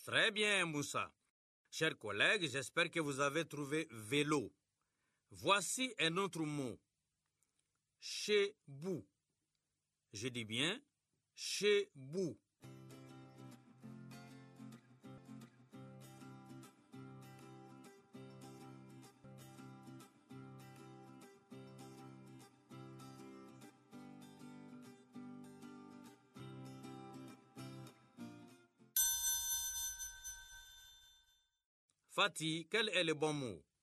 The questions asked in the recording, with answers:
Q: Fatih, quel est le bon mot?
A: Bouche, monsieur.